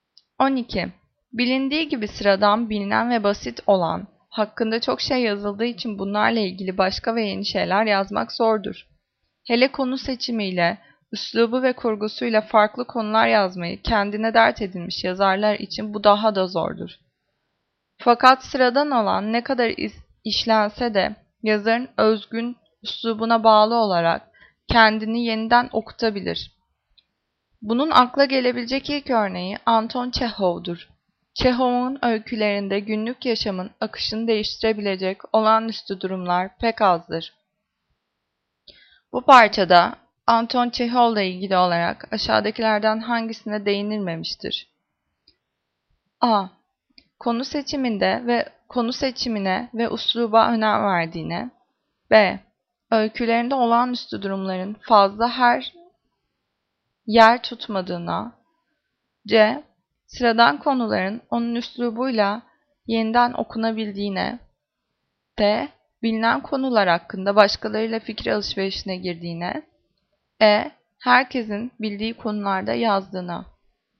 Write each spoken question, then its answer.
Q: Bu parçada Anton Çehov'la ilgili olarak aşağıdakilerden hangisine değinilmemiştir?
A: Cevap D. Bilinen konular hakkında başkalarıyla fikir alışverişine girdiğine.